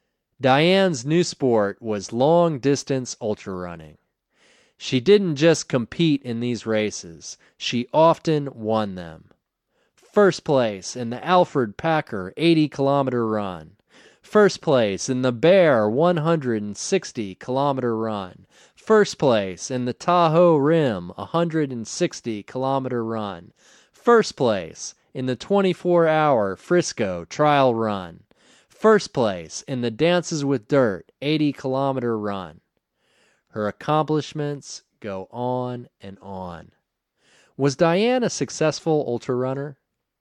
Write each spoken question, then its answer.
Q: Was Diane a successful ultra runner?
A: Yes, she was very successful.